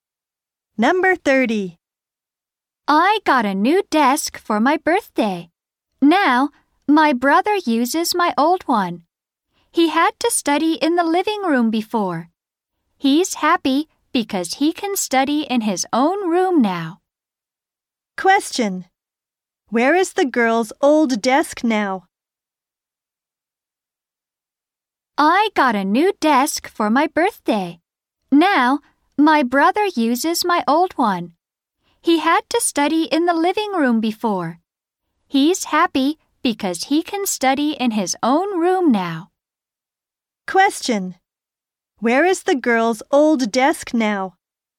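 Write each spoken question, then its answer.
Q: Where is the girl's old desk now?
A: In her brother's room.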